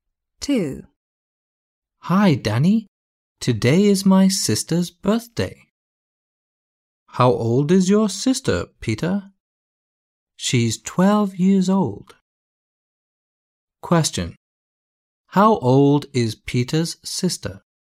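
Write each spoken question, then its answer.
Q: How old is Peter's sister?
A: 12 years old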